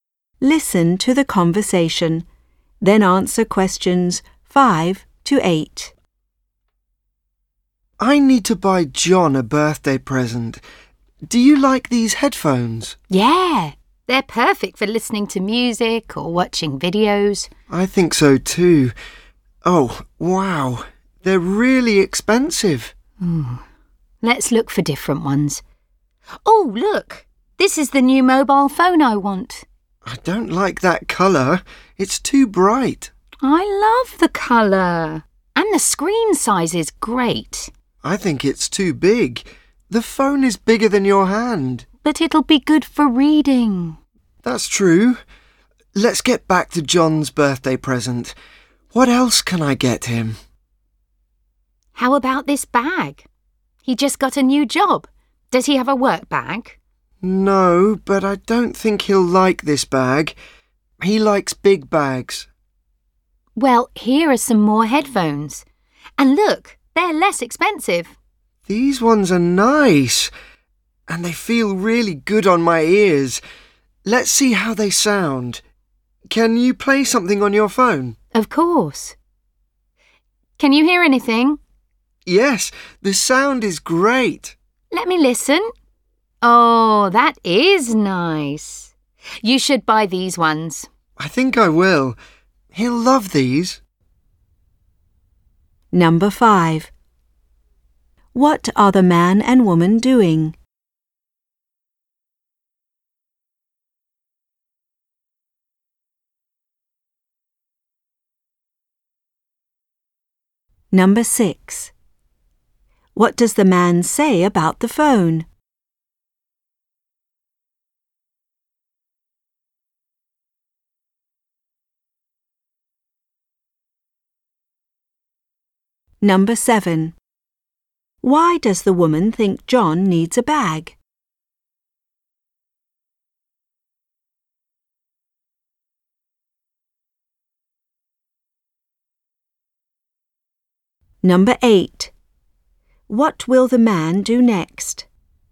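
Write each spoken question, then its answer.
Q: What are the man and woman doing?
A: Shopping for a birthday present for John

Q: What does the man say about the phone?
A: It's too big

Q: Why does the woman think John needs a bag?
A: He just got a new job

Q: What will the man do next?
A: Buy the headphones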